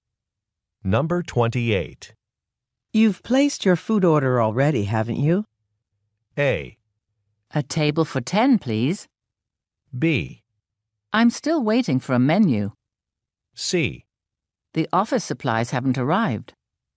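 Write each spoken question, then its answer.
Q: You've placed your food order already, haven't you?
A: B: I'm still waiting for a menu.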